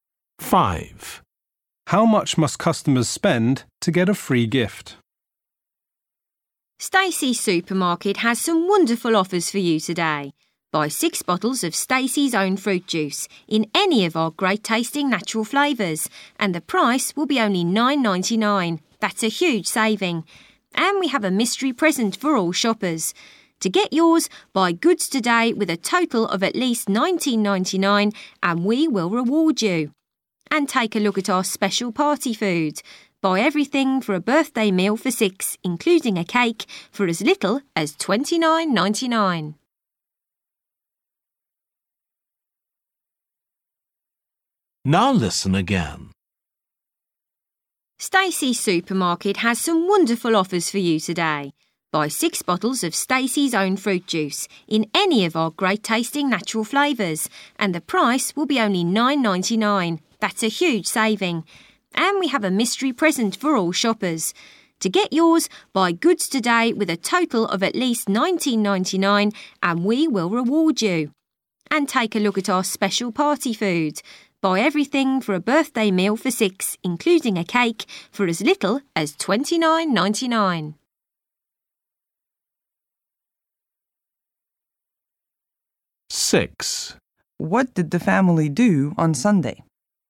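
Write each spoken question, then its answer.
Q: How much must customers spend to get a free gift?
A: at least $19.99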